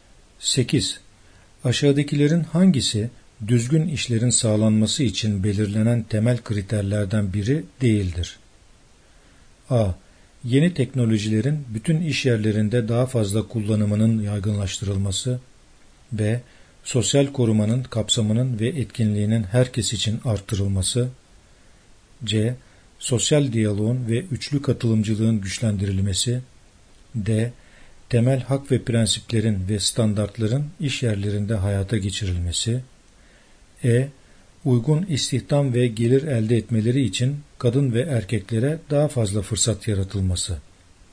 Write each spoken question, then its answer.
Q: Aşağıdakilerin hangisi düzgün işlerin sağlanması için belirlenen temel kriterlerden biri değildir?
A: Yanıt A. Yeni teknolojilerin bütün iş yerlerinde daha fazla kullanımının yaygınlaştırılması.